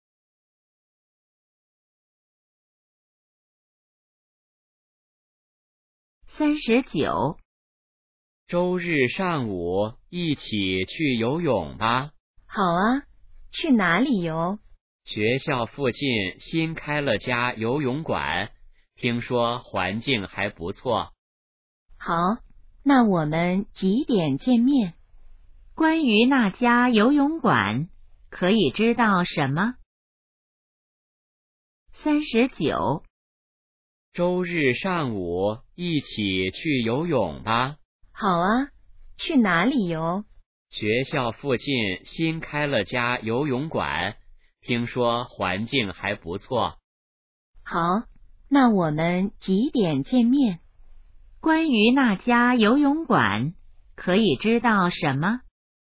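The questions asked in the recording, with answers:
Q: 关于那家游泳馆,可以知道什么?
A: 新开的,在学校附近,环境不错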